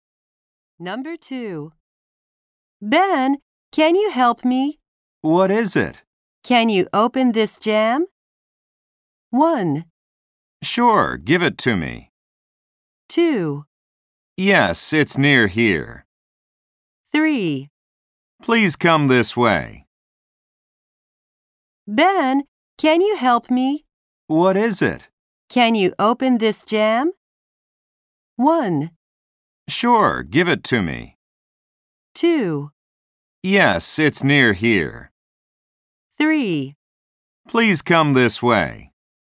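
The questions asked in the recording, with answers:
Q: Can you open this jam?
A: 1: Sure, give it to me.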